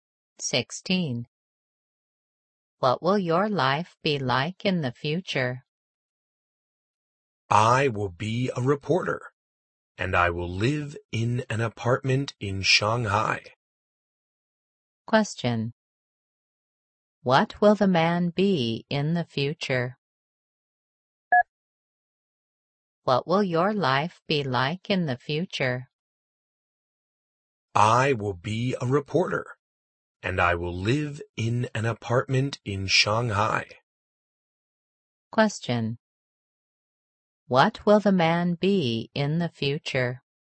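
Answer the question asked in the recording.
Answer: A reporter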